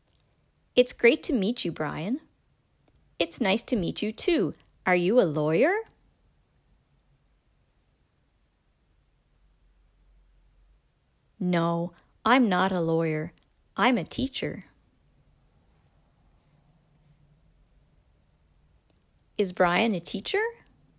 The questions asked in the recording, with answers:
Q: Is Brian a teacher?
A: Yes, he's a teacher.